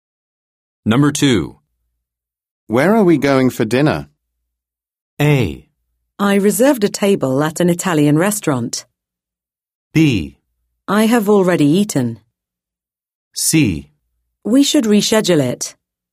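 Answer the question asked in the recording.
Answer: A: I reserved a table at an Italian restaurant.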